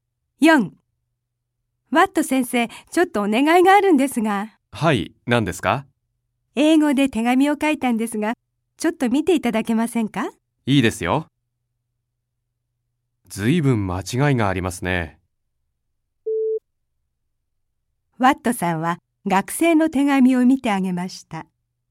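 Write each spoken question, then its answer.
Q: ワットさんは学生の手紙を見てあげました。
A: 正しい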